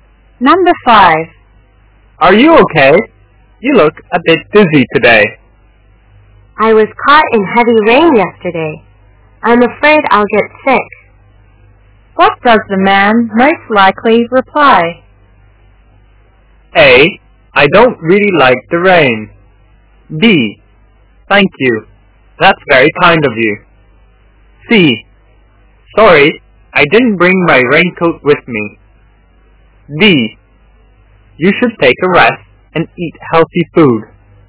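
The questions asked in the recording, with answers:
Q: What does the man most likely reply?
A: D: You should take a rest and eat healthy food.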